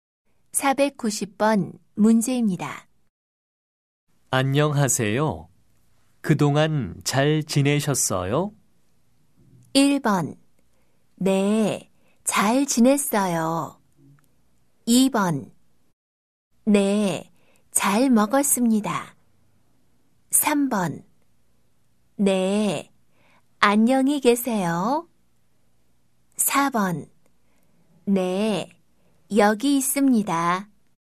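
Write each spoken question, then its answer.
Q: 안녕하세요. 그동안 잘 지내셨어요?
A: 1: 네, 잘 지냈어요.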